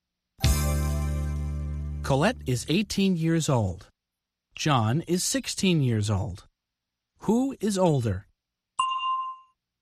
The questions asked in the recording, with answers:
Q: Who is older?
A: Colette is. Colette is older than John.